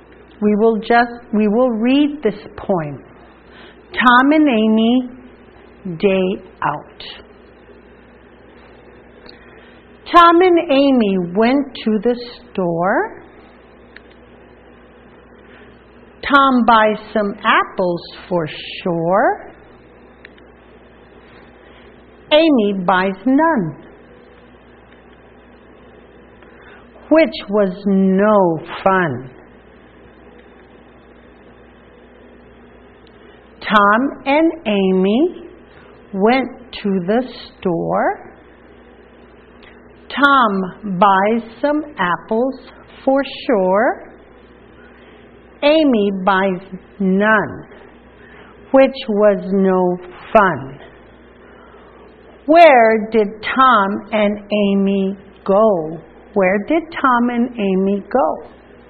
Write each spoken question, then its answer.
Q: Where did Tom and Amy go?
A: Tom and Amy went to the store.